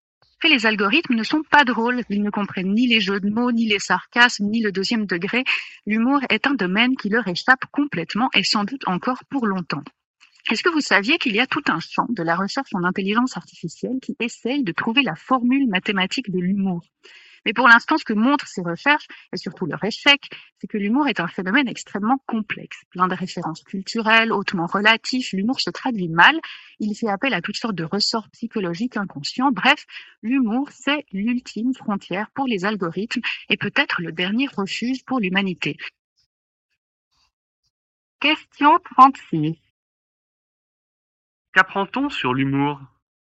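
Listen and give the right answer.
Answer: C'est un phénomène extrêmement complexe que les algorithmes ne parviennent pas à saisir.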